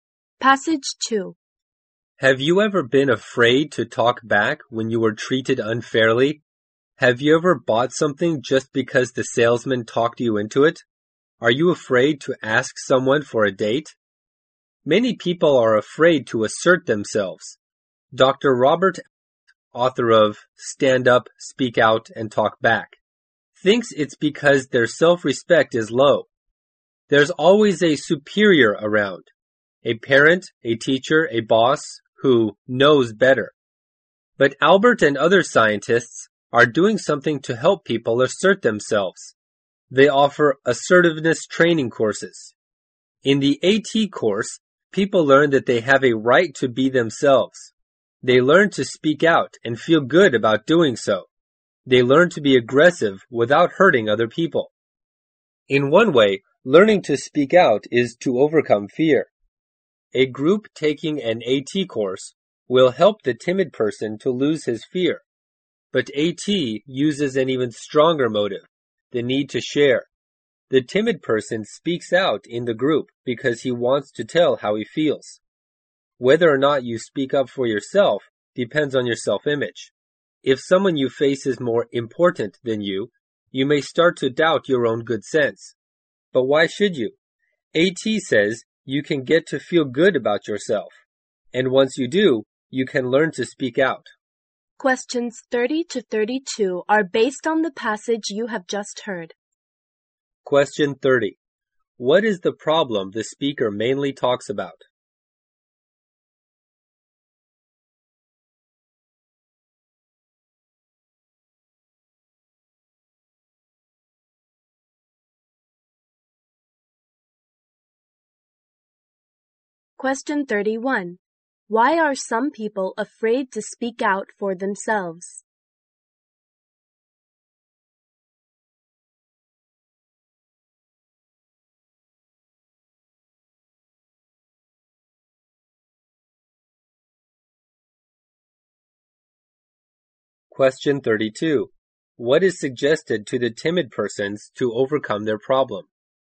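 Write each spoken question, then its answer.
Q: What is the problem the speaker mainly talks about?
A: People being afraid to assert themselves.

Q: Why are some people afraid to speak out for themselves?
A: Their self-respect is low.

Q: What is suggested to the timid persons to overcome their problem?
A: Take an assertiveness training course.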